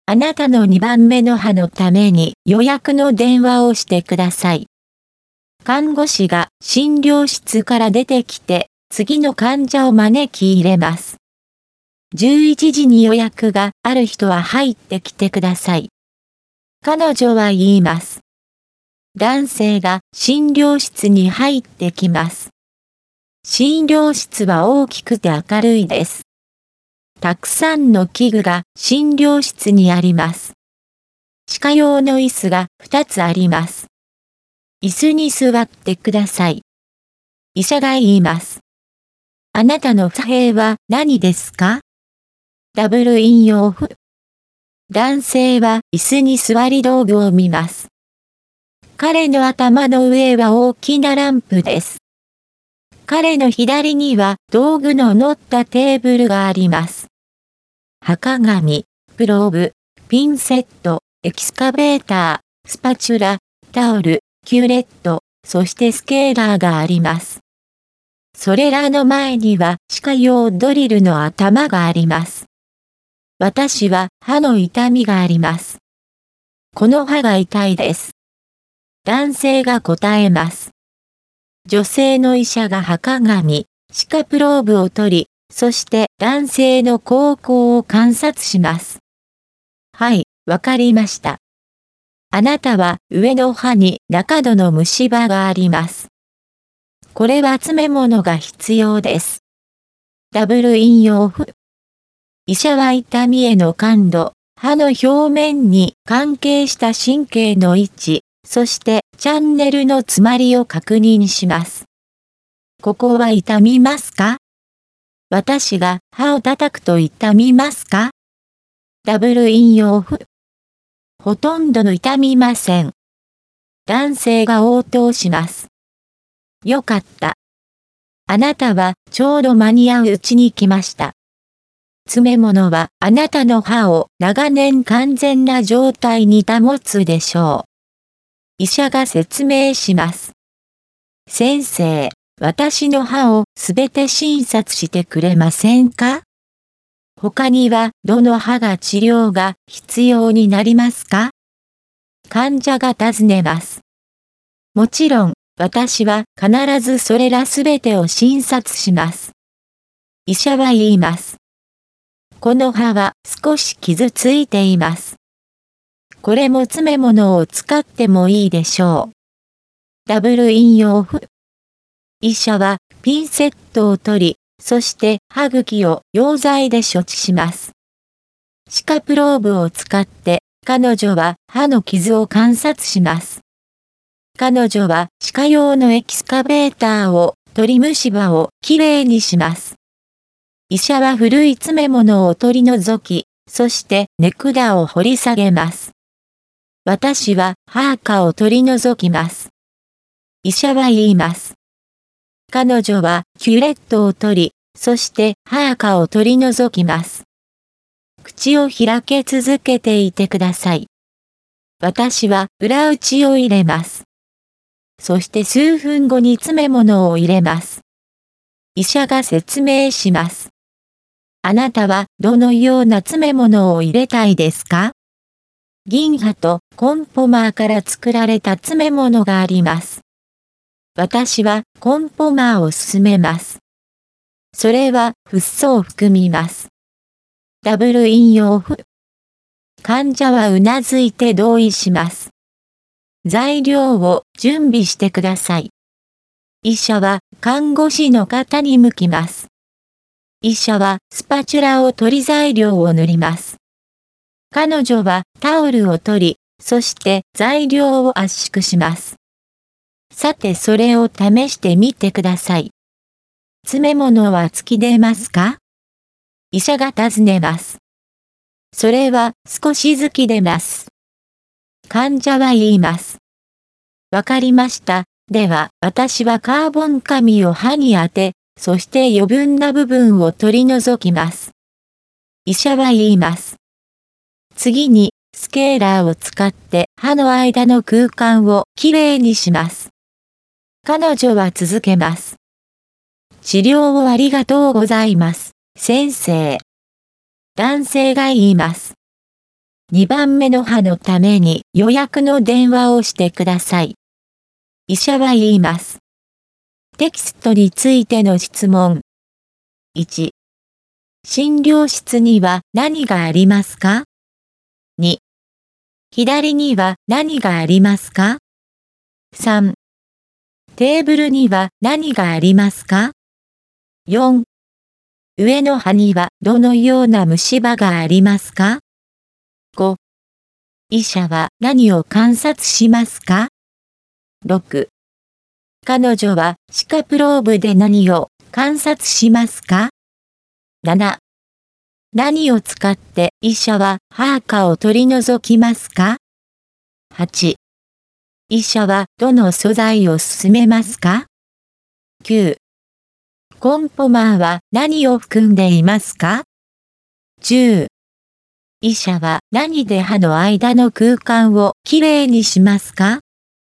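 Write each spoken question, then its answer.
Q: 診療室には何がありますか?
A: たくさんの器具と歯科用の椅子が2つ

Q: 左には何がありますか?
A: 道具の乗ったテーブル

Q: テーブルには何がありますか?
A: 歯鏡、プローブ、ピンセット、エキスカベーター、スパチュラ、タオル、キューレット、スケーラー

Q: 上の歯にはどのような虫歯がありますか?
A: 中度の虫歯

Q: 彼女は歯科プローブで何を観察しますか?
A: 歯の傷

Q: 何を使って医者は歯垢を取り除きますか?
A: キュレット

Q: 医者はどの素材を勧めますか?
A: コンポマー

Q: コンポマーは何を含んでいますか?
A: フッ素

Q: 医者は何で歯の間の空間をきれいにしますか?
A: スケーラー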